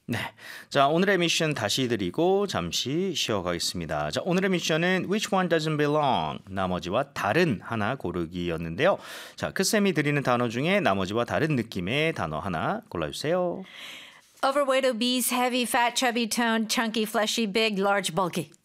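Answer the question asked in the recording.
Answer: toned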